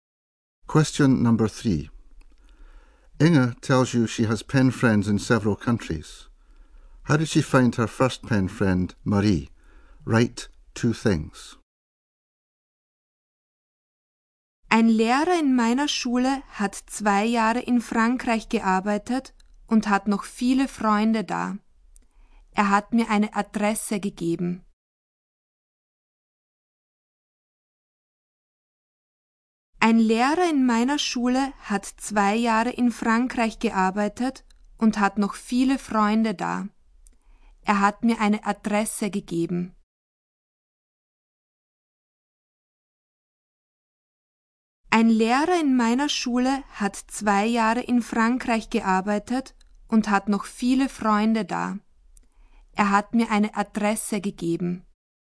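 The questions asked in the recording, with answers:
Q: How did she find her first pen friend, Marie?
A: A teacher who had worked in France for 2 years gave her an address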